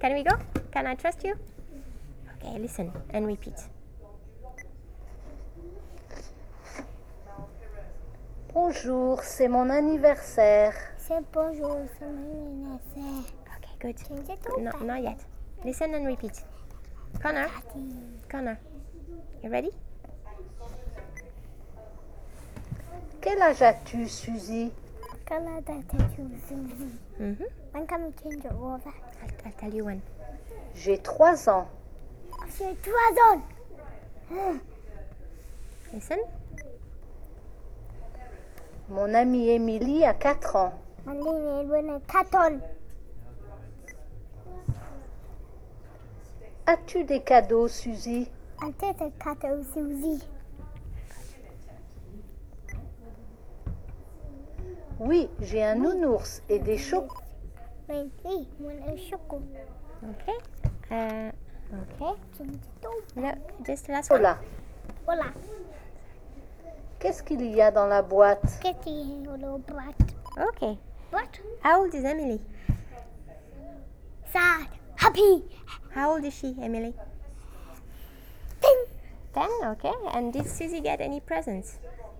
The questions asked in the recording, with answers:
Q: And did Susie get any presents?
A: Yes.